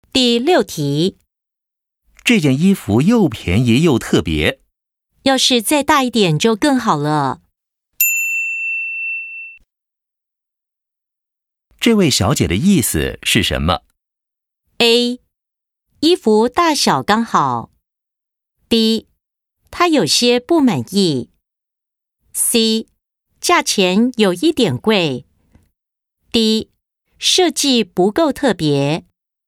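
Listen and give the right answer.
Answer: B: 她有些不满意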